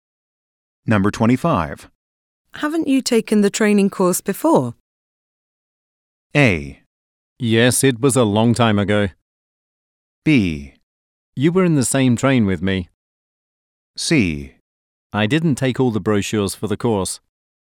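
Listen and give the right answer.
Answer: A: Yes, it was a long time ago.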